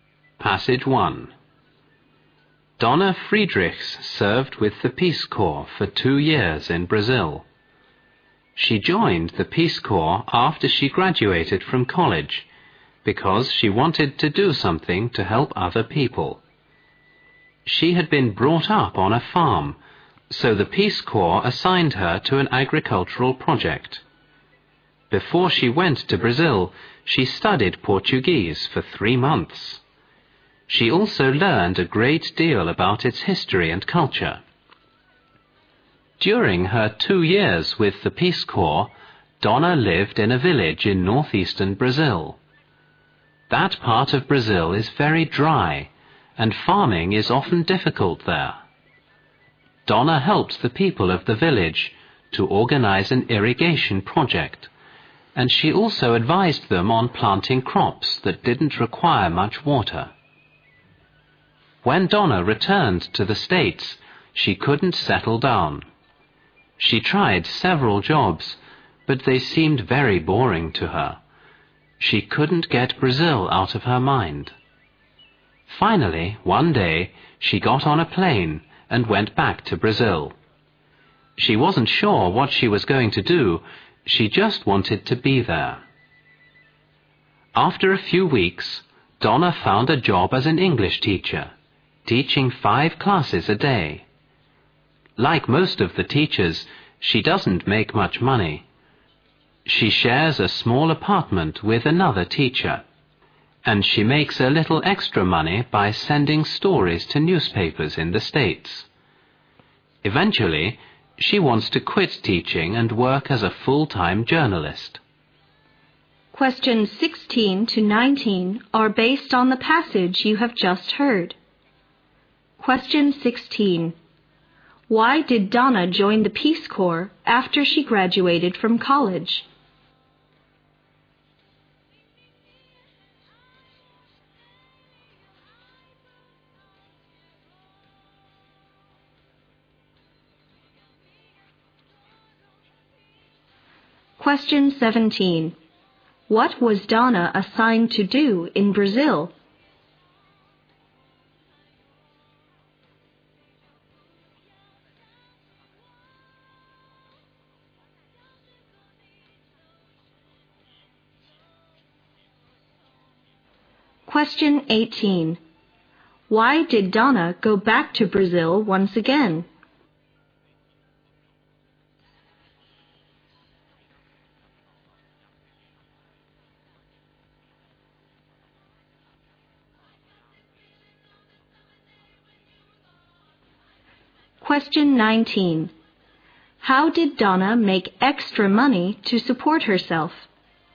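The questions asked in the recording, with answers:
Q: Why did Donna join the Peace Corps after she graduated from college?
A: She wanted to help other people

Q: What was Donna assigned to do in Brazil?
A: Work on an agricultural project

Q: Why did Donna go back to Brazil once again?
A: She couldn't get Brazil out of her mind and found jobs at home boring

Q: How did Donna make extra money to support herself?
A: By sending stories to newspapers in the States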